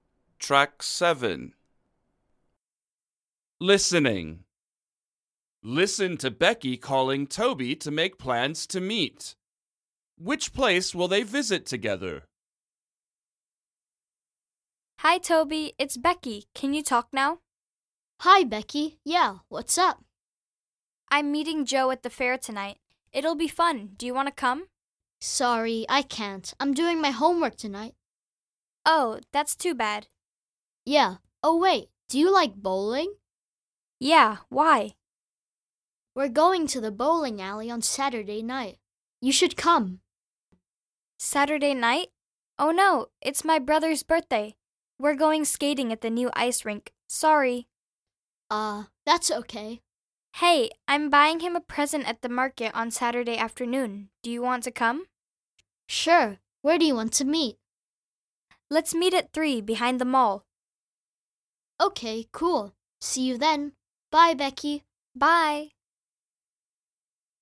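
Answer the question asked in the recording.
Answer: the market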